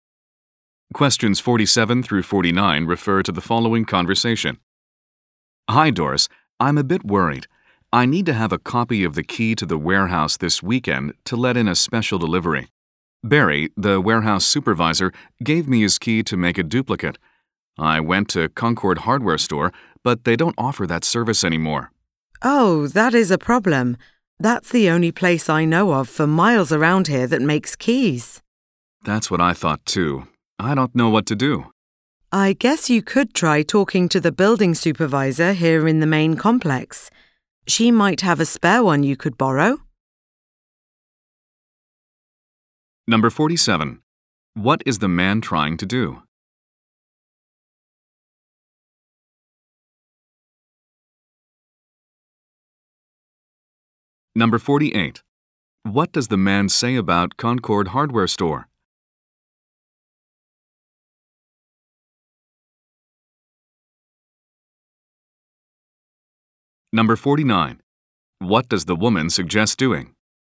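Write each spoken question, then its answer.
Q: What is the man trying to do?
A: Get a copy of the warehouse key made

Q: What does the man say about Concord Hardware Store?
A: It no longer copies keys

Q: What does the woman suggest doing?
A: Ask the building supervisor for a spare key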